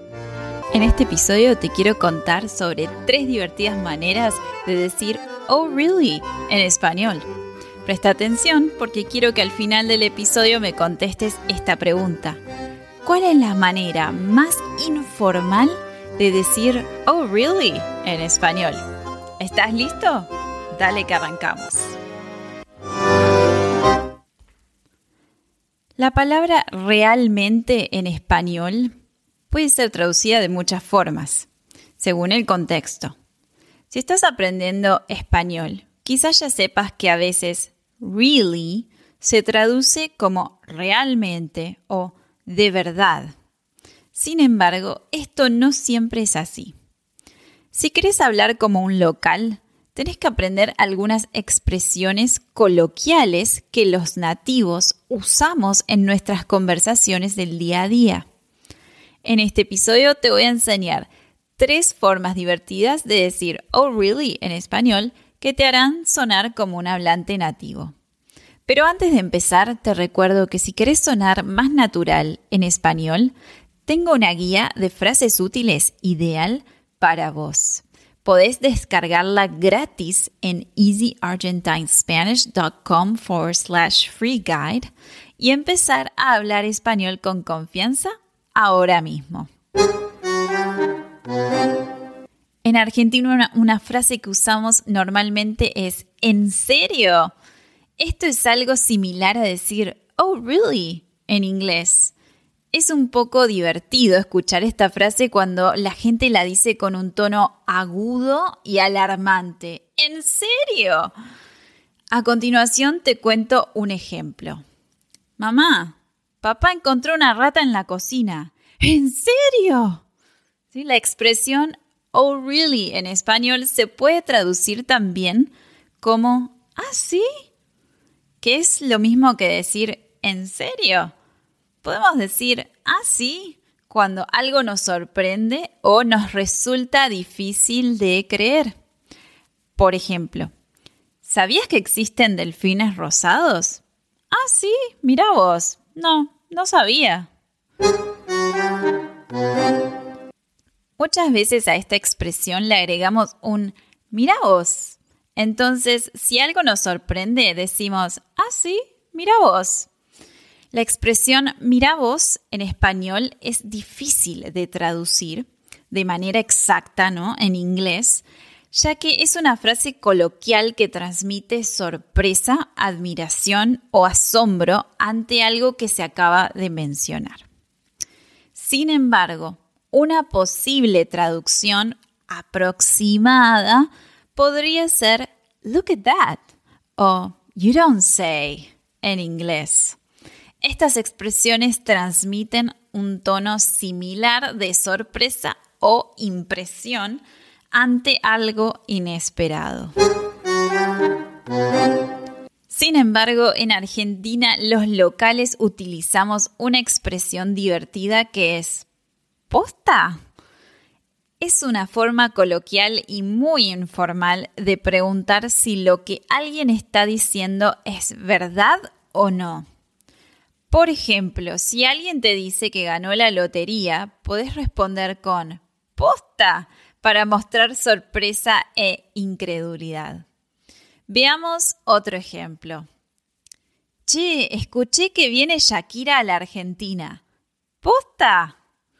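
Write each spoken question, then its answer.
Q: ¿Cuál es la manera más informal de decir "Oh, really?" en español?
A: ¿Posta?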